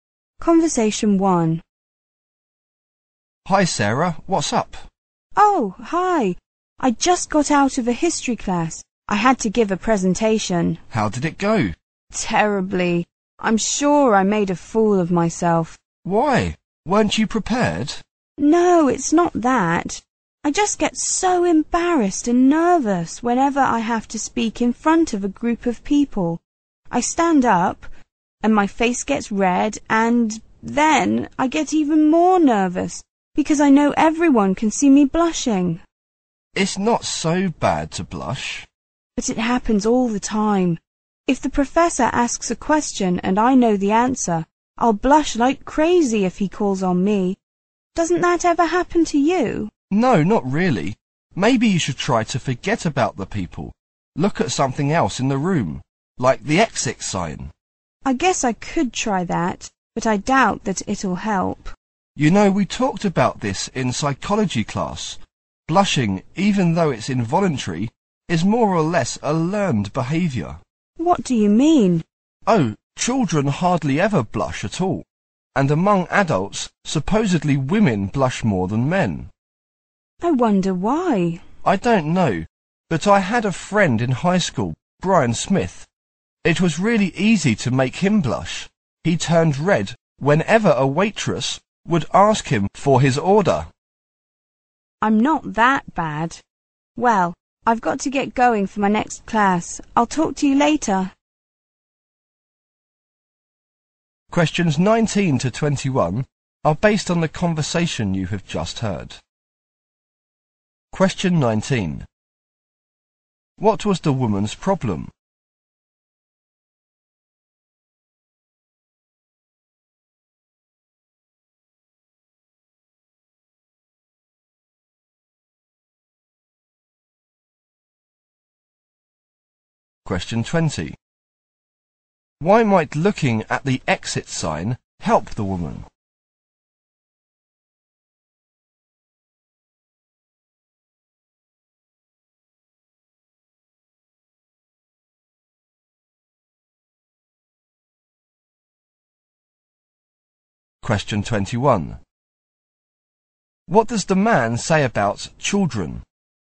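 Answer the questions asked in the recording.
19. She gets nervous and blushes when speaking in front of people
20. It might help her forget about the people
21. They hardly ever blush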